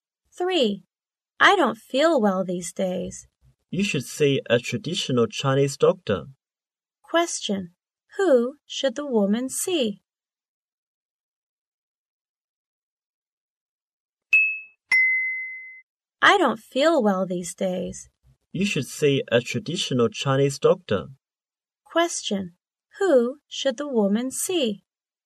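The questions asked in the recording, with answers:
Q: Who should the woman see?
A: A traditional Chinese doctor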